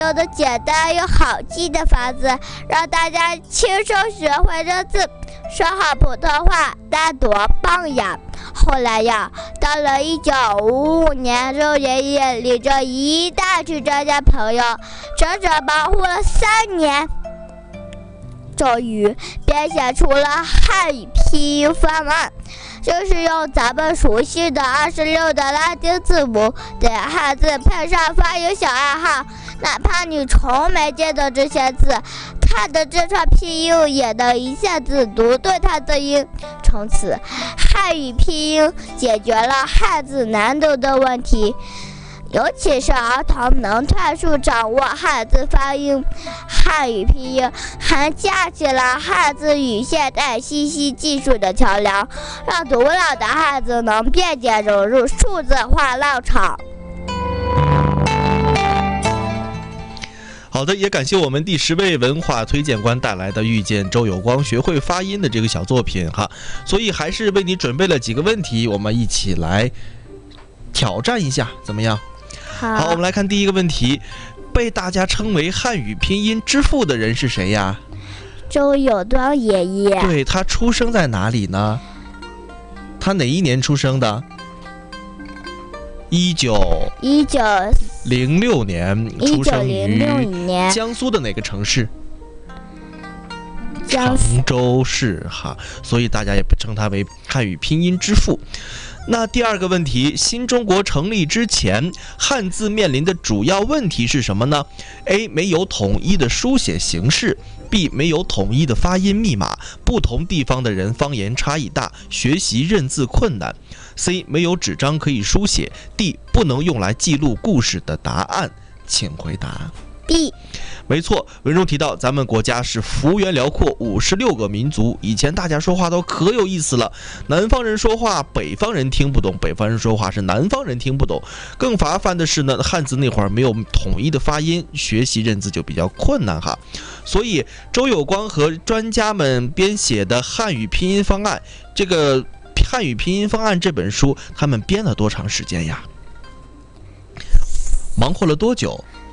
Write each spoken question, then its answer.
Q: 这个汉语拼音方案这本书他们编了多长时间呀?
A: 3年。